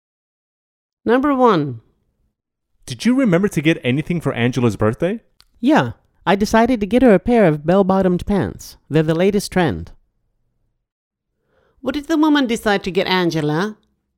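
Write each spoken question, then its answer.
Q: What did the woman decide to get Angela?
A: a pair of bell-bottomed pants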